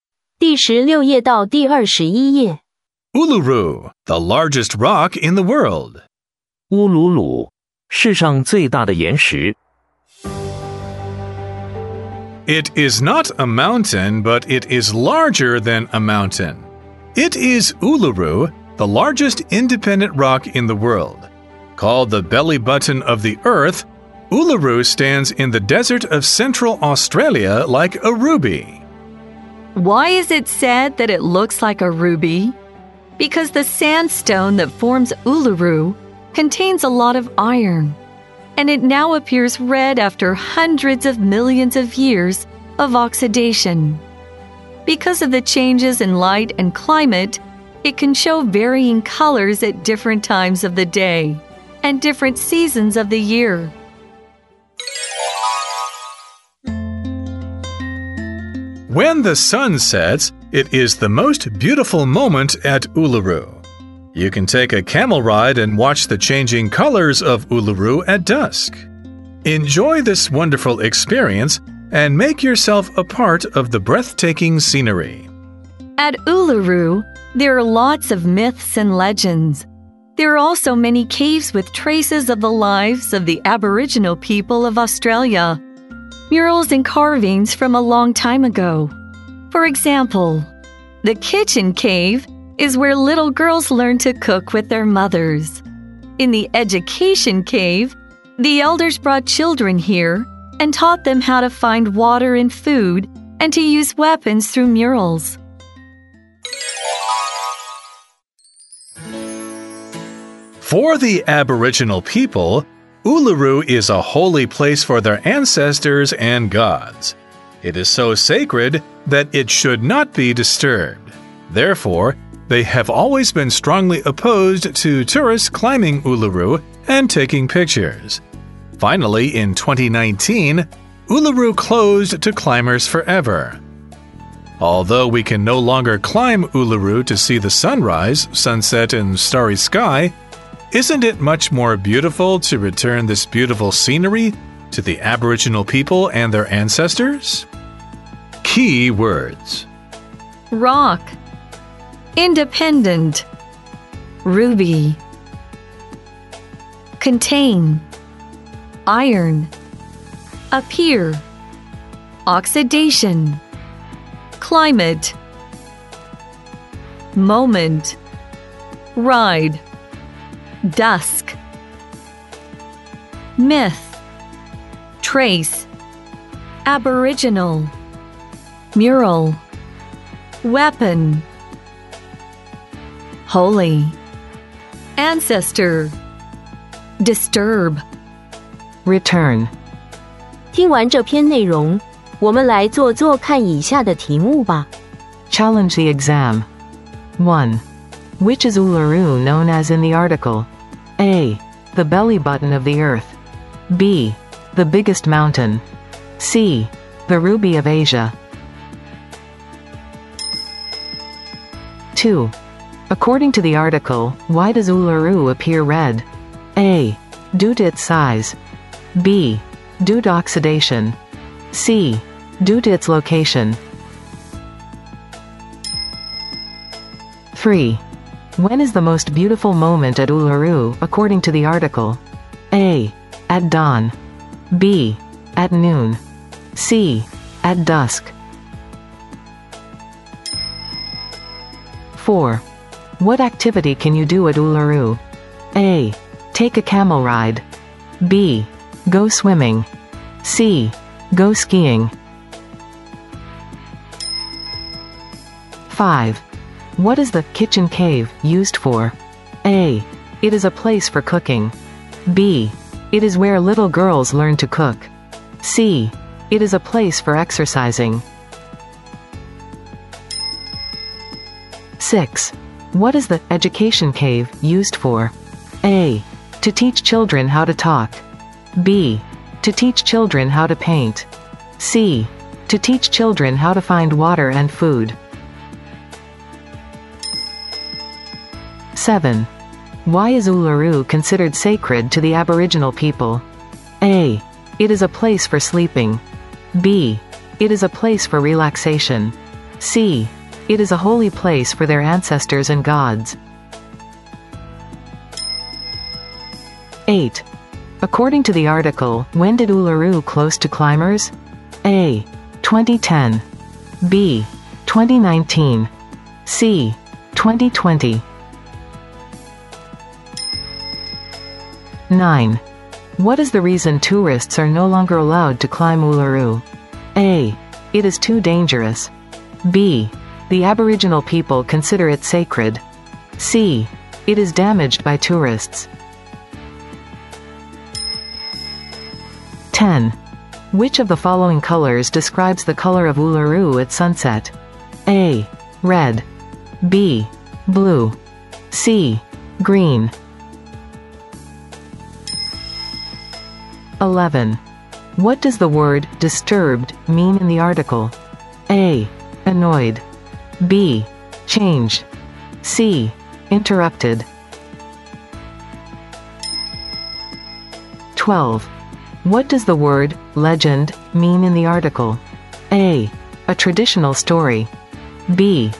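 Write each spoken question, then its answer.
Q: Which is Uluru known as in the article?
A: A: The belly button of the earth

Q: According to the article, why does Uluru appear red?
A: B: Due to oxidation

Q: When is the most beautiful moment at Uluru, according to the article?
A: C: At dusk

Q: What activity can you do at Uluru?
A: A: Take a camel ride

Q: What is the kitchen cave used for?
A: B: It is where little girls learn to cook

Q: What is the education cave used for?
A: C: To teach children how to find water and food

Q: Why is Uluru considered sacred to the Aboriginal people?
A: C: It is a holy place for their ancestors and gods

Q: According to the article, when did Uluru close to climbers?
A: B: 2019

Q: What is the reason tourists are no longer allowed to climb Uluru?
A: B: The Aboriginal people consider it sacred

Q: What does the word legend mean in the article?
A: A: A traditional story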